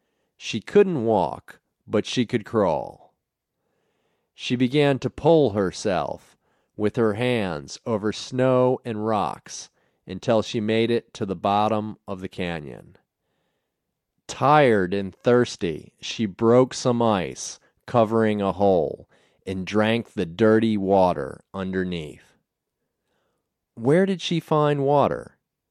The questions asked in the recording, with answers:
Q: Where did she find water?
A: She found water in a hole covered with ice.